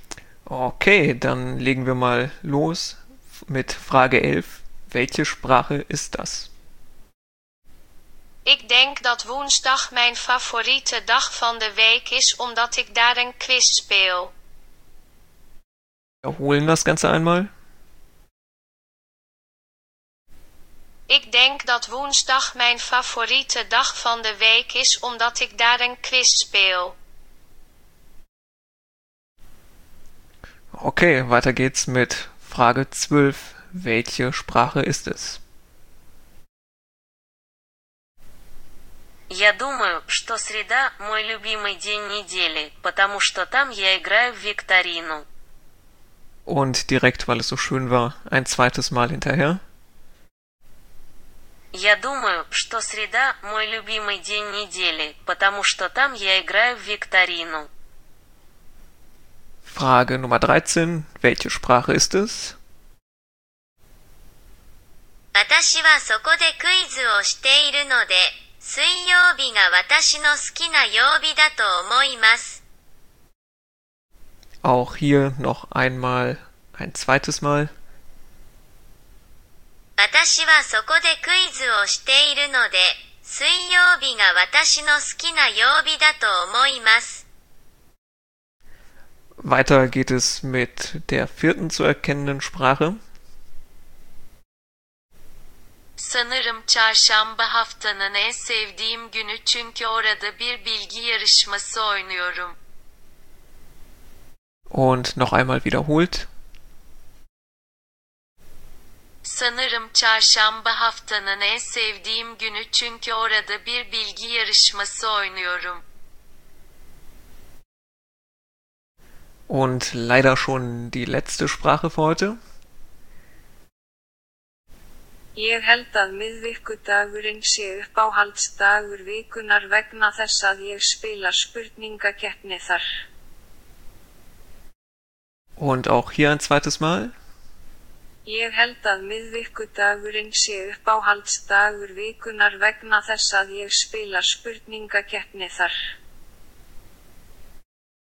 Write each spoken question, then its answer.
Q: Welche Sprache ist es?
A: Lösung 12. Das war Russisch.

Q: Welche Sprache ist es?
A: Lösung 13 war Japanisch.

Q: weiter geht es mit der vierten zu erkennenden Sprache.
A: Lösung Nummer 14 war Türkisch.

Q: Und leider schon die letzte Sprache für heute.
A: Isländisch.